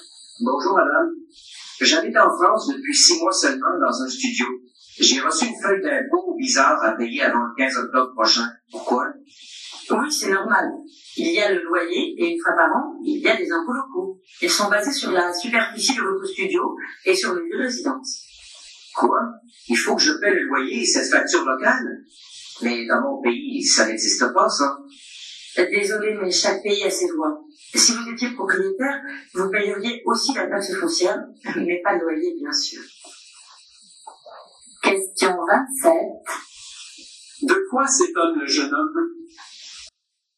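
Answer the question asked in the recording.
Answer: De devoir payer des impôts locaux en plus du loyer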